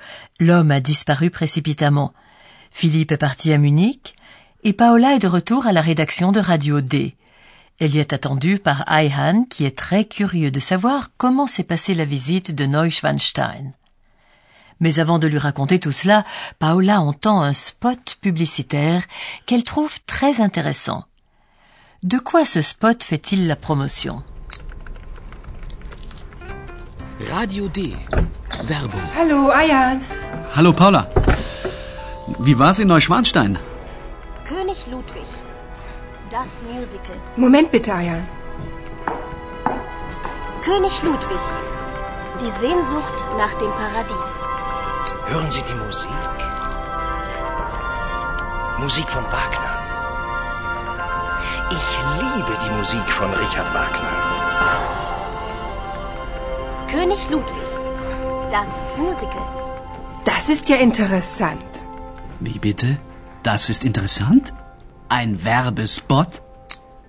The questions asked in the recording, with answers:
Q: De quoi ce spot fait-il la promotion?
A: Le spot publicitaire fait la promotion d'une comédie musicale qui retrace la vie et la mort du roi Louis II.